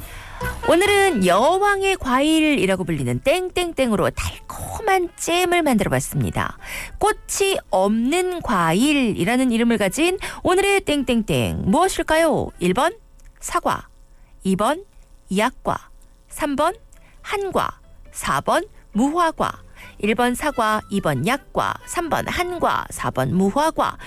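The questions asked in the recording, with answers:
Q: 꽃이 없는 과일이라는 이름을 가진 오늘의 땡땡땡 무엇일까요?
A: 4: 무화과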